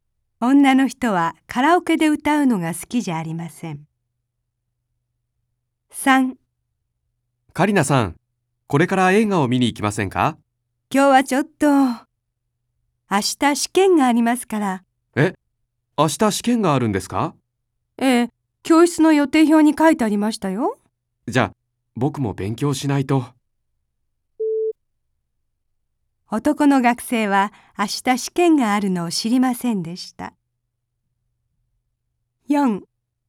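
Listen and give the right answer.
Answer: 正しい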